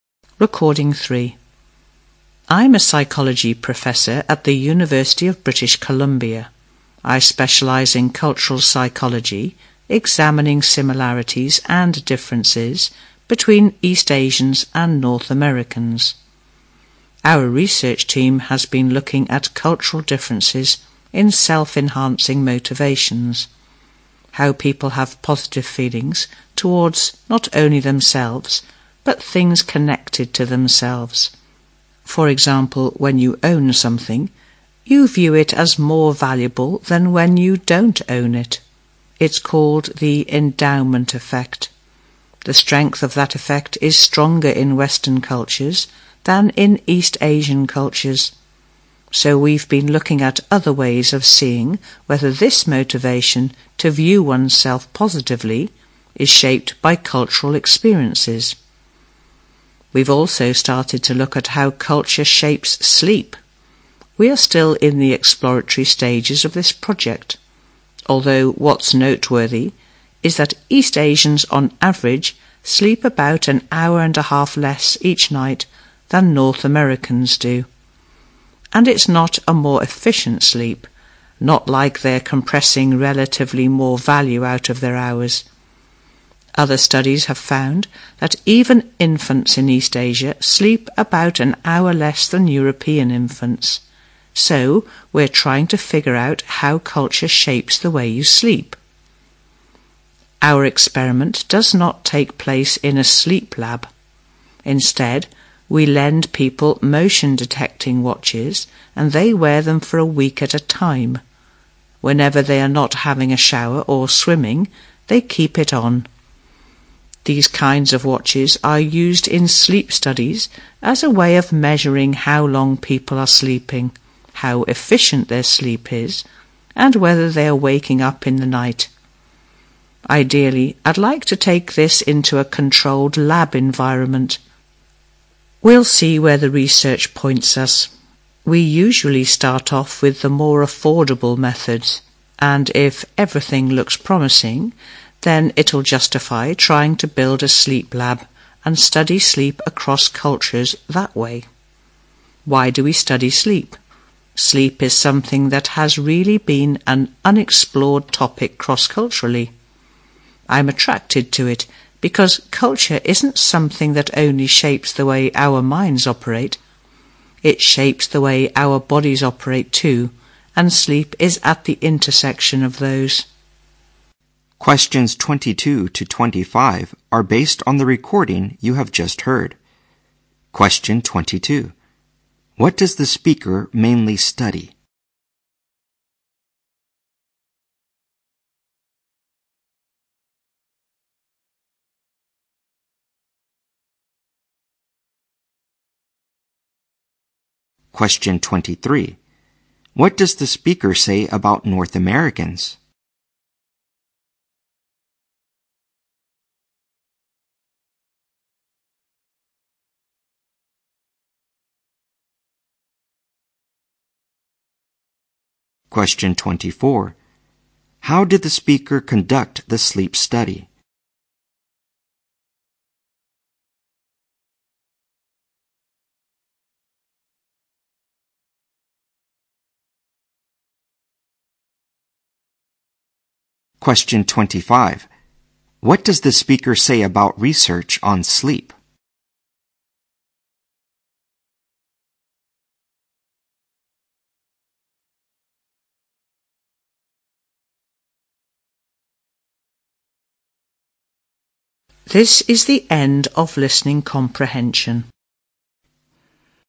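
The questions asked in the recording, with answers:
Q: What does the speaker mainly study?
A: Cultural psychology

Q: What does the speaker say about North Americans?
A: They sleep about an hour and a half more each night than East Asians

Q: How did the speaker conduct the sleep study?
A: By lending people motion-detecting watches to wear for a week

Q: What does the speaker say about research on sleep?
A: It has been largely unexplored across cultures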